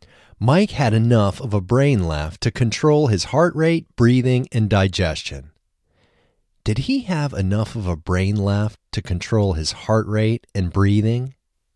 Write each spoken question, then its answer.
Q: Did he have enough of a brain left to control his heart rate and breathing?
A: Yes, he had enough of a brain left to control his heart rate and breathing.